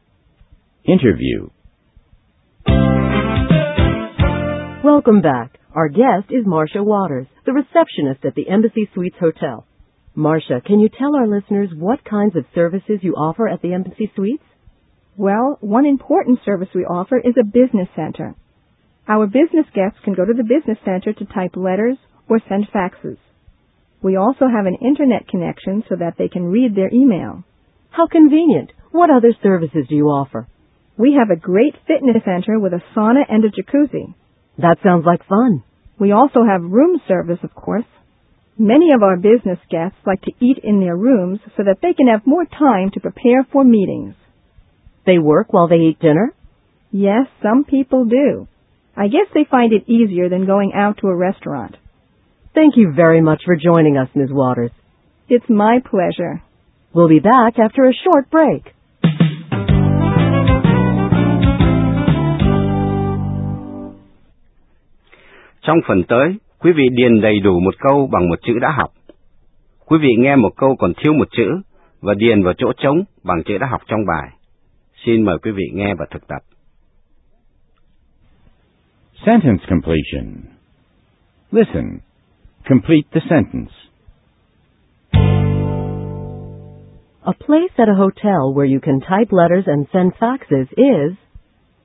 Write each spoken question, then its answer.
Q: A place at a hotel where you can type letters and send faxes is...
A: A business center. It's a business center.